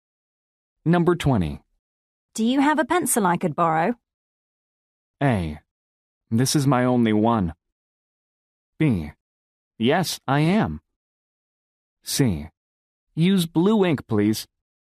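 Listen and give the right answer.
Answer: A: This is my only one.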